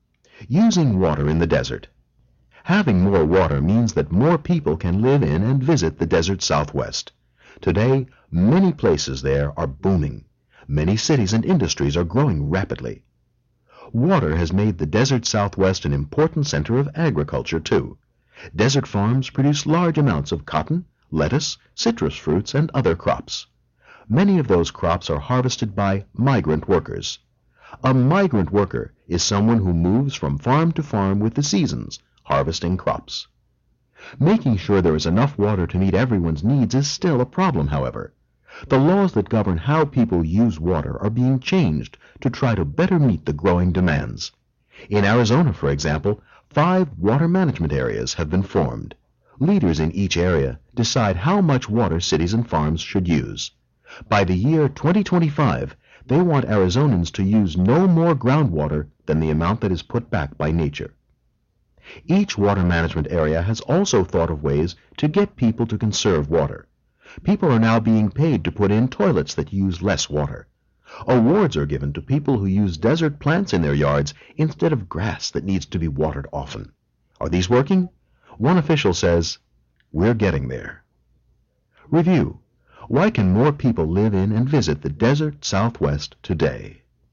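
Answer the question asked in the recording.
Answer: Because more water has been brought to the desert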